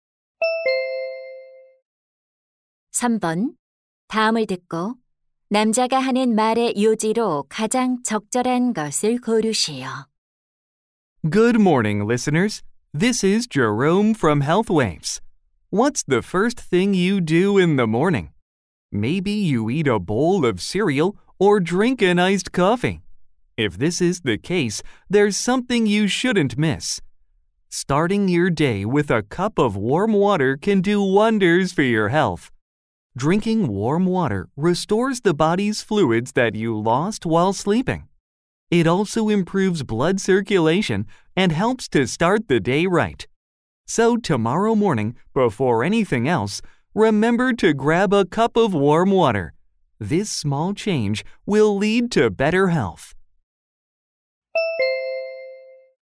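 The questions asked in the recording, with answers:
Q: 다음을 듣고 남자가 하는 말의 요지로 가장 적절한 것을 고르시오.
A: 아침에 따뜻한 물 한 잔을 마시는 것은 건강에 좋다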